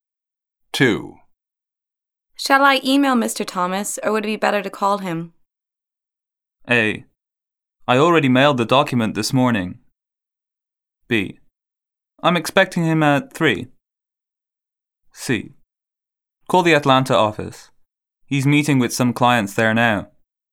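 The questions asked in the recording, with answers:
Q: Shall I email Mr. Thomas, or would it be better to call him?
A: C: Call the Atlanta office. He's meeting with some clients there now.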